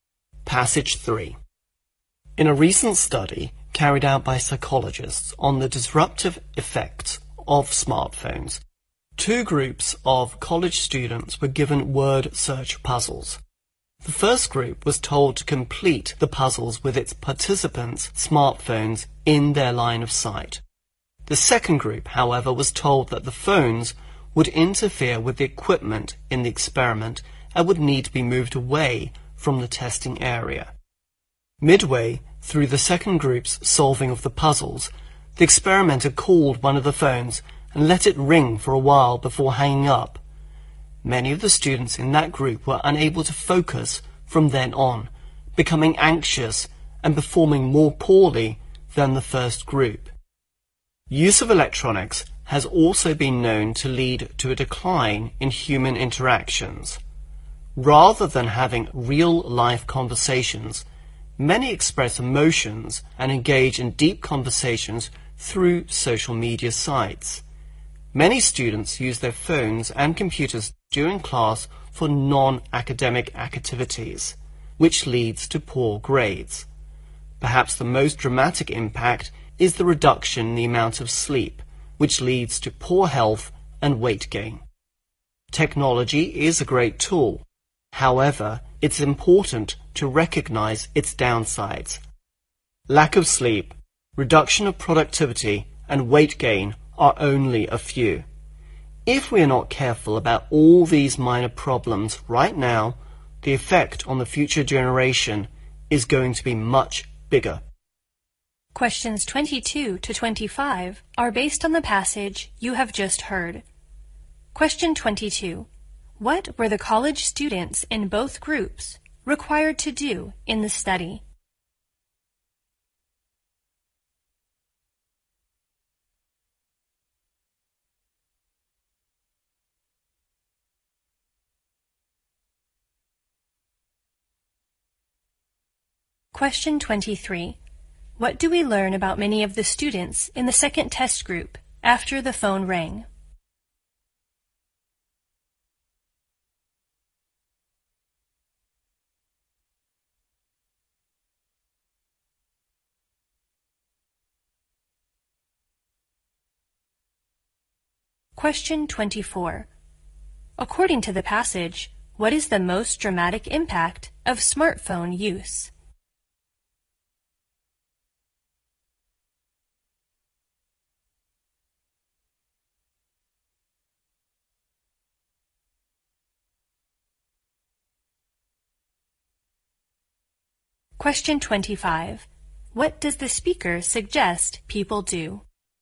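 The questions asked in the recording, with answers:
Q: What were the college students in both groups required to do in the study?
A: Complete word search puzzles

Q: What do we learn about many of the students in the second test group after the phone rang?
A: They couldn't focus, became anxious and performed worse

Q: According to the passage, what is the most dramatic impact of smartphone use?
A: Reduced sleep

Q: What does the speaker suggest people do?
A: Recognize technology's downsides and be careful about them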